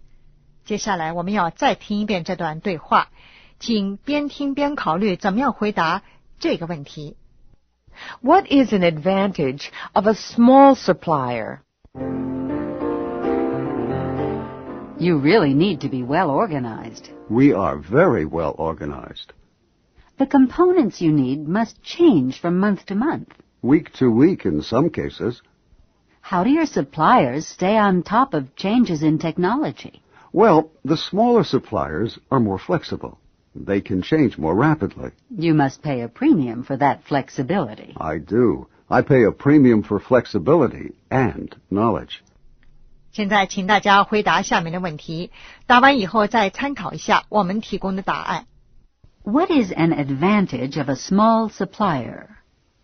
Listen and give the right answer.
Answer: Usually, they are more flexible.